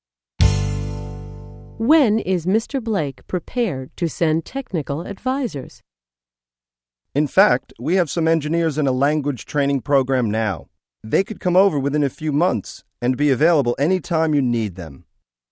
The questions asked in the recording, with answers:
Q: When is Mr. Blake prepared to send technical advisors?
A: The engineers are in a language training program now, and they'll be available within a few months.